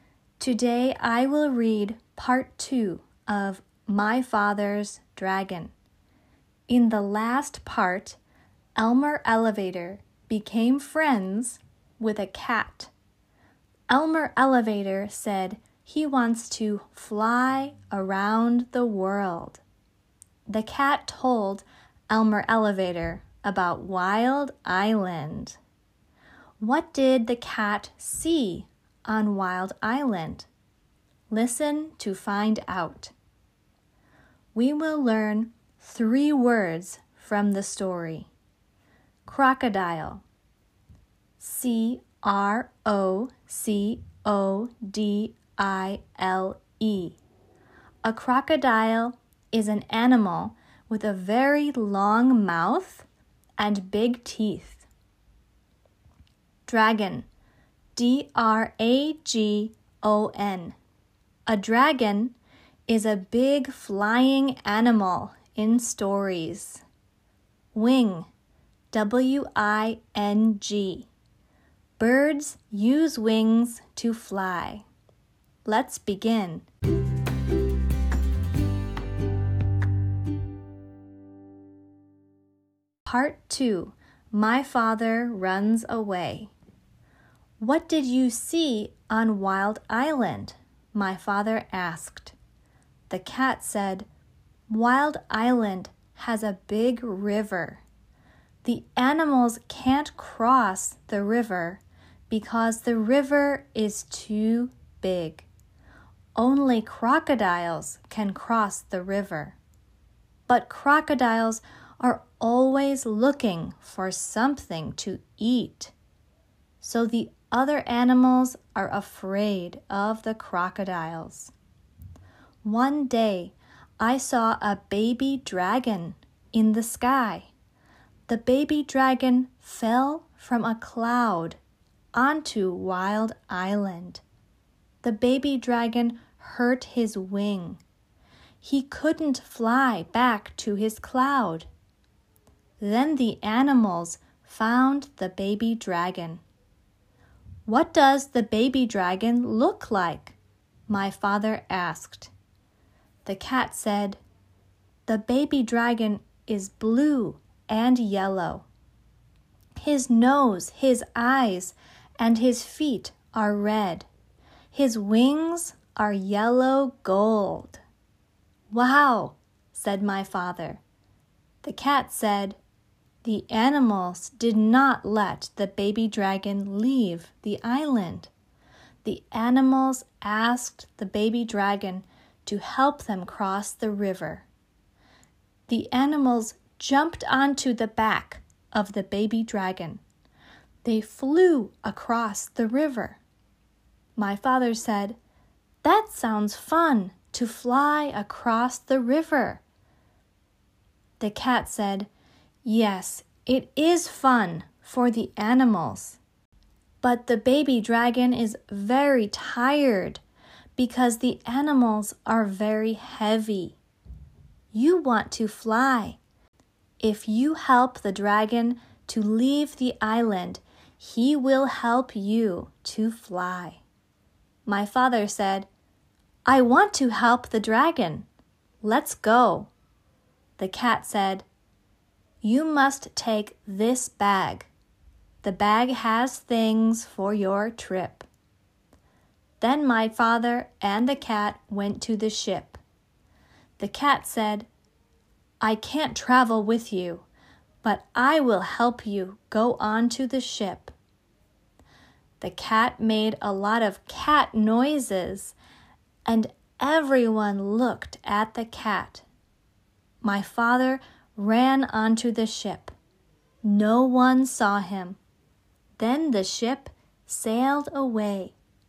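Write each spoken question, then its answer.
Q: What did the cat see on Wild Island?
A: A baby dragon that fell from a cloud and hurt his wing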